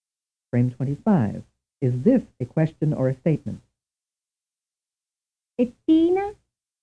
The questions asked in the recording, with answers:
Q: Is this a question or a statement?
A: The answer is a question.